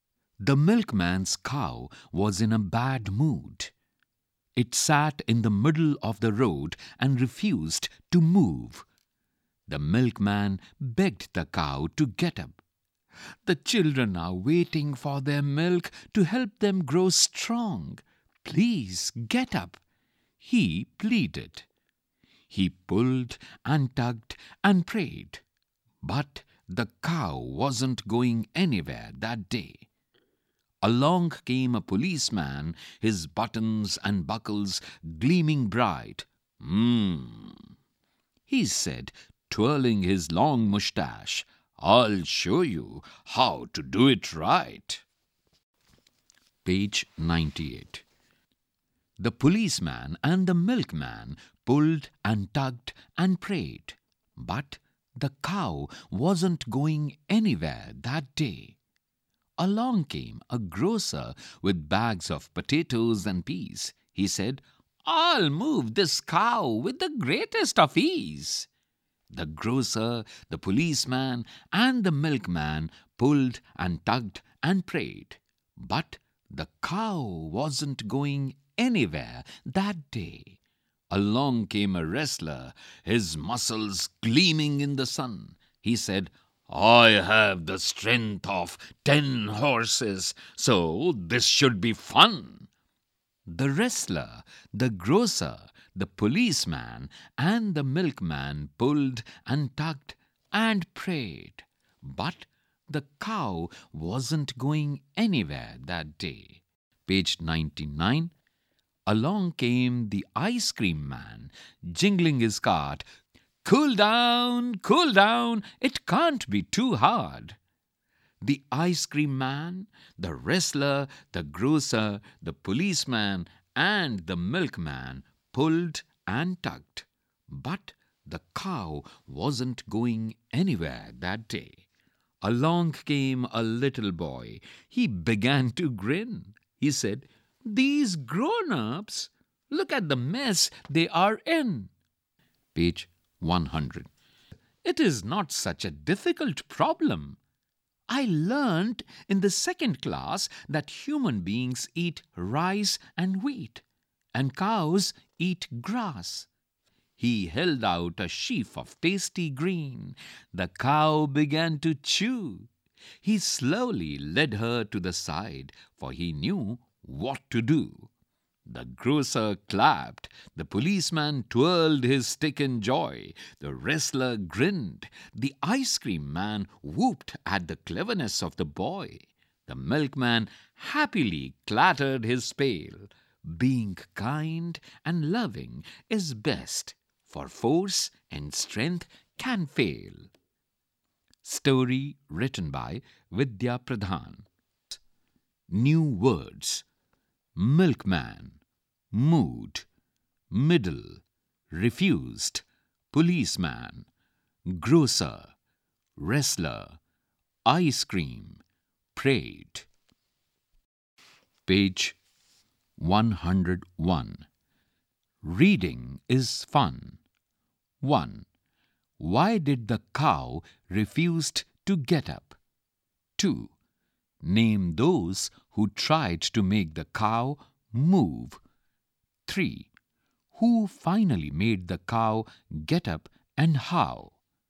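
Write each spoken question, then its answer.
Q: Why did the cow refuse to get up?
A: It was in a bad mood.

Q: Name those who tried to make the cow move.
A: The milkman, the policeman, the grocer, the wrestler and the ice cream man.

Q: Who finally made the cow get up and how?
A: A little boy, by holding out a sheaf of tasty green grass and slowly leading her to the side.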